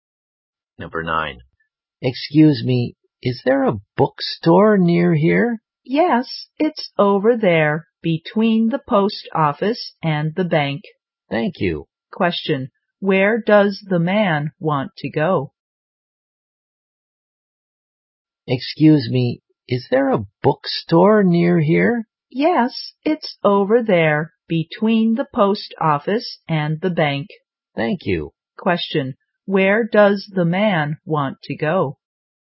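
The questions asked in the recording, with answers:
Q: Question, where does the man want to go?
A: A bookstore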